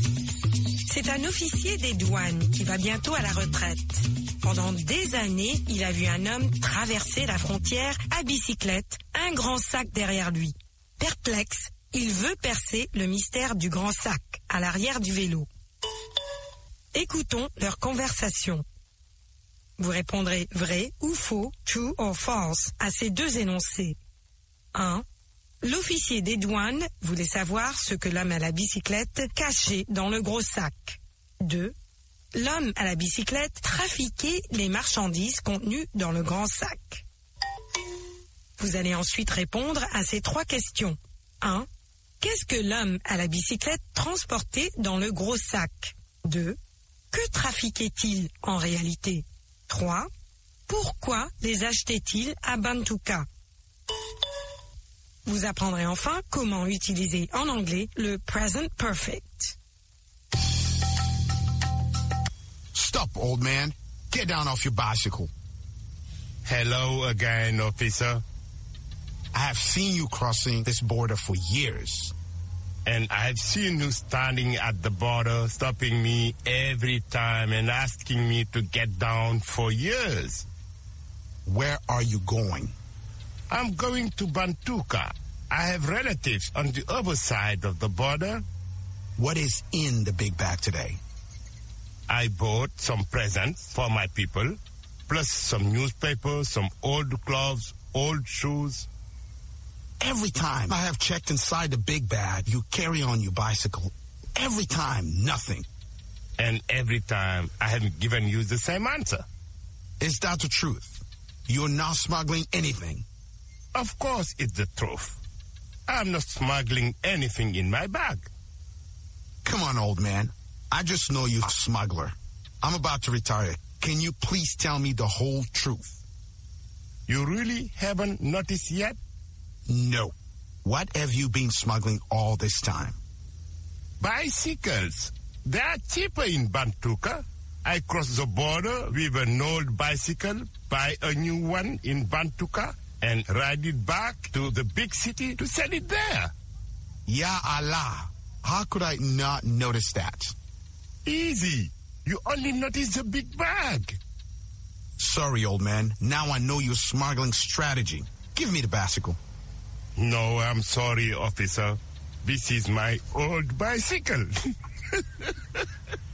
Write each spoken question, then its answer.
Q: L'officier des douanes voulait savoir ce que l'homme à la bicyclette cachait dans le gros sac.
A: L'énoncé 1 est vrai.

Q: L'homme à la bicyclette trafiquait les marchandises contenues dans le grand sac.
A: L'énoncé 2 est faux.

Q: Qu'est-ce que l'homme à la bicyclette transportait dans le gros sac?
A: Des cadeaux, des journaux, de vieux habits et de vieilles chaussures.

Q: Que trafiquait-il en réalité?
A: Des bicyclettes.

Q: Pourquoi les achetait-il à Bantuka?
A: Parce qu'elles coûtent moins cher à Bantuka.